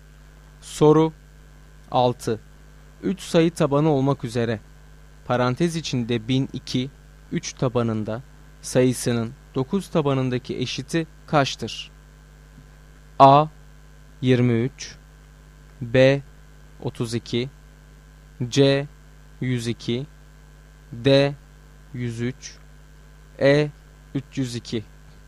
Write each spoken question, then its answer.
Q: 3 sayı tabanı olmak üzere parantez içinde 1002 3 tabanında sayısının 9 tabanındaki eşiti kaçtır?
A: Doğru cevap B şıkkı.